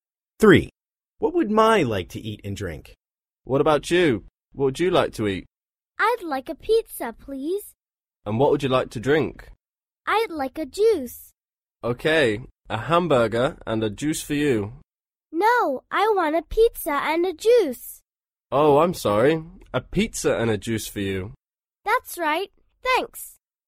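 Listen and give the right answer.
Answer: A pizza and a juice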